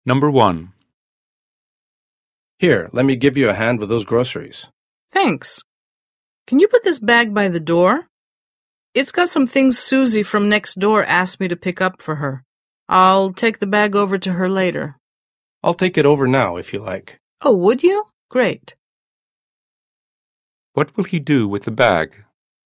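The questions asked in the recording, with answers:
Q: What will he do with the bag?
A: Take it over to Susie next door now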